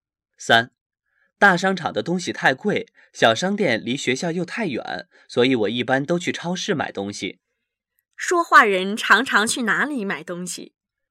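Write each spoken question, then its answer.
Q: 说话人常常去哪里买东西?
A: 超市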